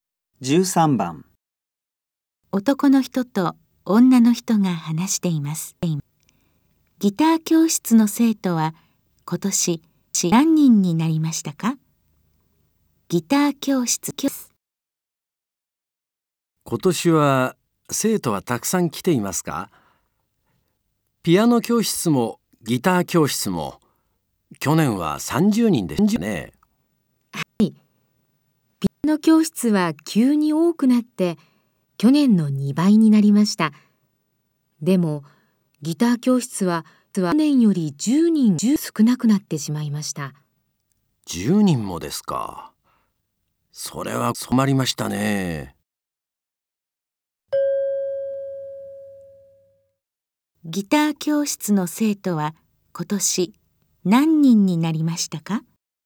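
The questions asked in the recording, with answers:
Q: ギター教室の生徒は今年何人になりましたか?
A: 20人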